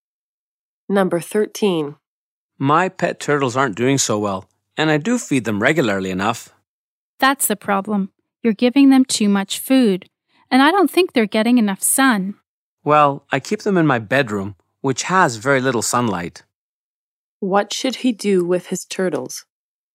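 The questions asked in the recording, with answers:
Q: What should he do with his turtles?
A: Feed them less and give them more sun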